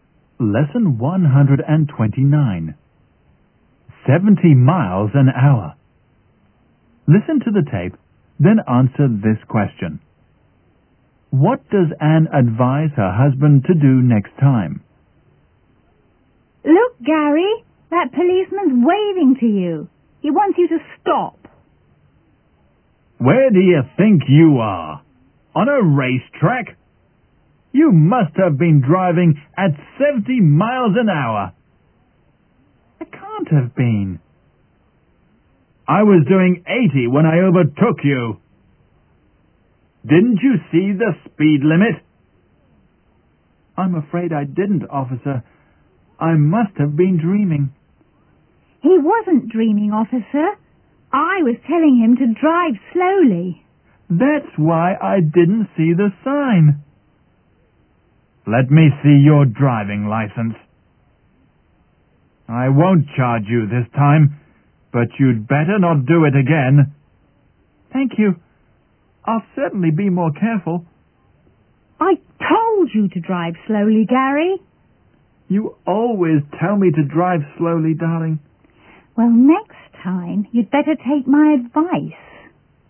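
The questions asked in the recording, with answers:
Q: What does Anne advise her husband to do next time?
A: To drive slowly and take her advice.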